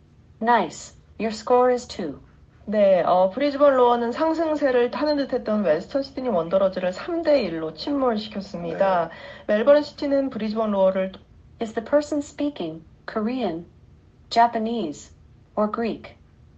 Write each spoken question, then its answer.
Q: Is the person speaking Korean, Japanese, or Greek?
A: Let's go Korean.